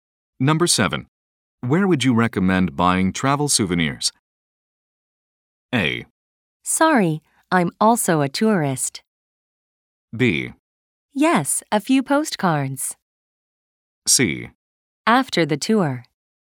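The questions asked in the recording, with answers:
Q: Where would you recommend buying travel souvenirs?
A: A: Sorry, I'm also a tourist.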